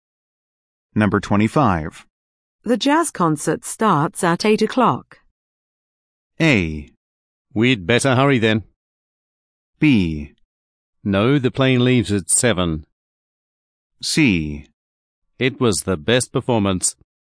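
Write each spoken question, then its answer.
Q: The jazz concert starts at 8 o'clock.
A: A: We'd better hurry then.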